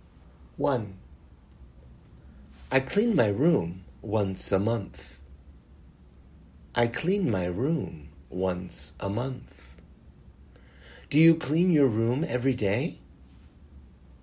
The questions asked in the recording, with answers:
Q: Do you clean your room every day?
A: No, I don't clean my room every day.